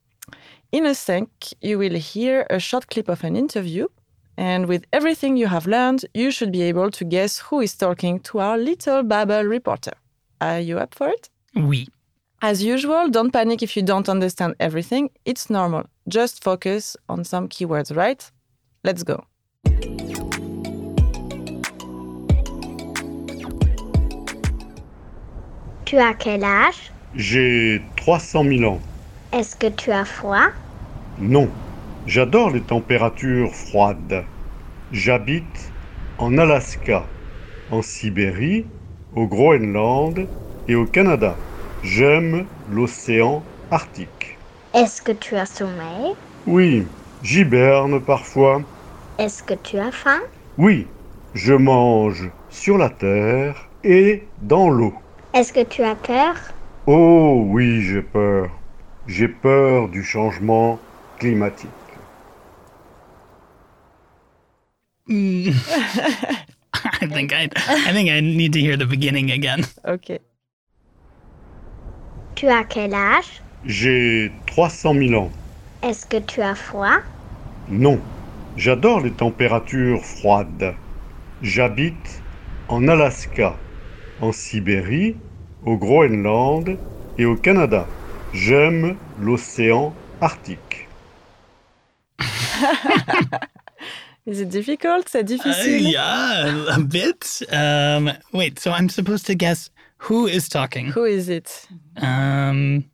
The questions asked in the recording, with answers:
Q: Who is it?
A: C'est l'ours polaire.